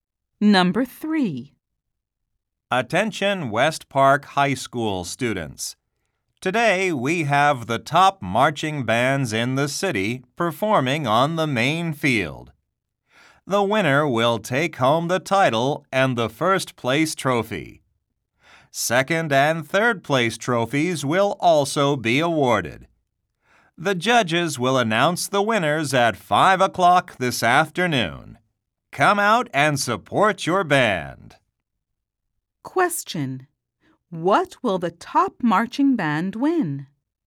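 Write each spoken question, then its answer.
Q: What will the top marching band win?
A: The title and the first place trophy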